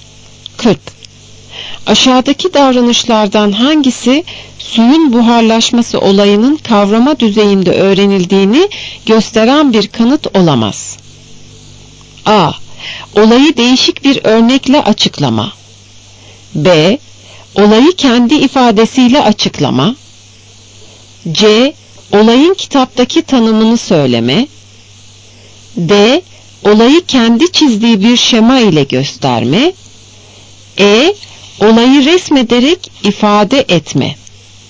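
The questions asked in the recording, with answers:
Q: Aşağıdaki davranışlardan hangisi suyun buharlaşması olayının kavrama düzeyinde öğrenildiğini gösteren bir kanıt olamaz?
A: C: Olayın kitaptaki tanımını söyleme.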